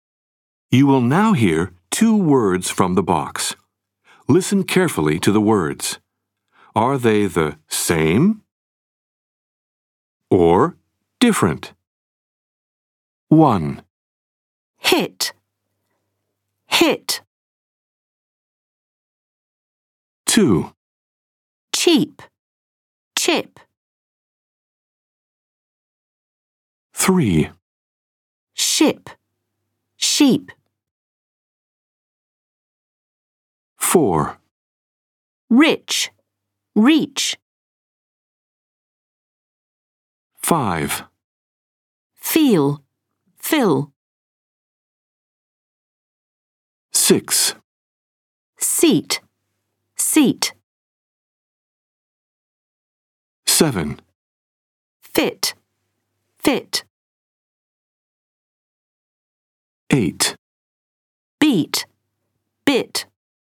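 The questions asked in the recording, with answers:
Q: Hit, hit.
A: same

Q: Cheap, chip.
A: different

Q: Ship, sheep.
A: different

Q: Rich, reach.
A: different

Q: Feel, fill.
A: different

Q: Seat, seat.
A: same

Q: Fit, fit.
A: same

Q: Beat, bit.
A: different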